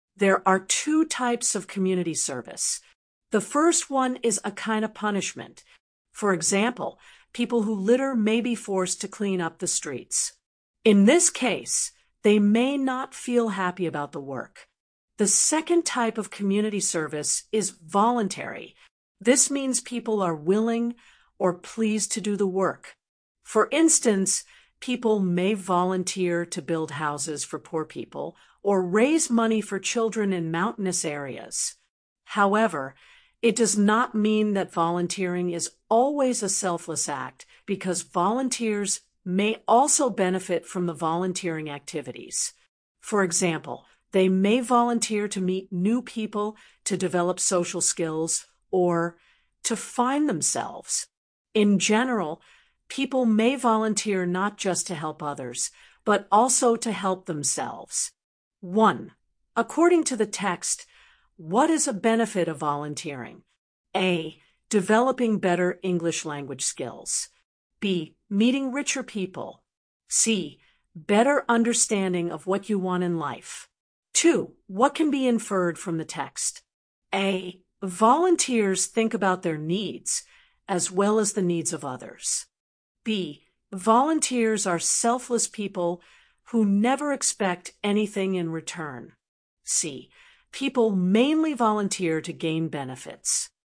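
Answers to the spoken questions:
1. C: Better understanding of what you want in life.
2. A: Volunteers think about their needs as well as the needs of others.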